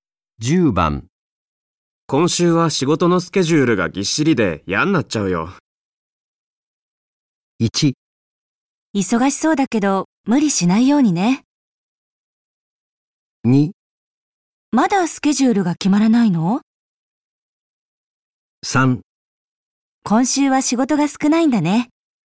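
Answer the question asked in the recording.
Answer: 1: 忙しそうだけど無理しないようにね。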